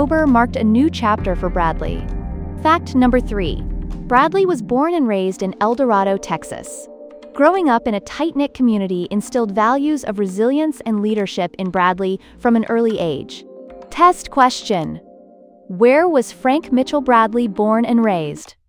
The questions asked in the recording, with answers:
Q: Where was Frank Mitchell Bradley born and raised?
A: Correct answer, El Dorado, Texas.